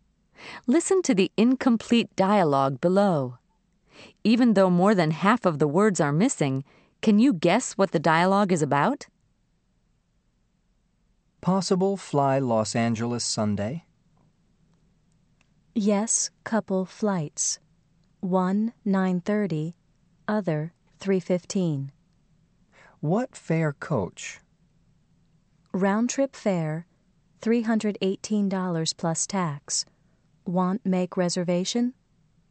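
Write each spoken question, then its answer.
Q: Even though more than half of the words are missing, can you guess what the dialogue is about?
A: Booking a flight to Los Angeles on Sunday (asking about flight times and the fare)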